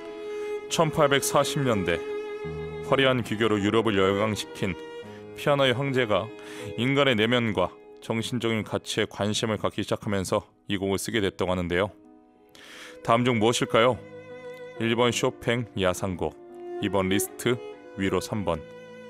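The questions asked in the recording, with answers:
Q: 다음 중 무엇일까요?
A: 2: 리스트, 위로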